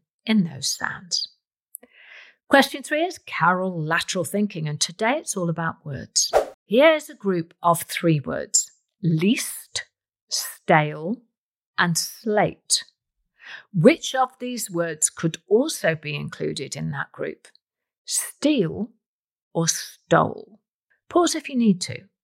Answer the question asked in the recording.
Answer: And the answer is steal, S T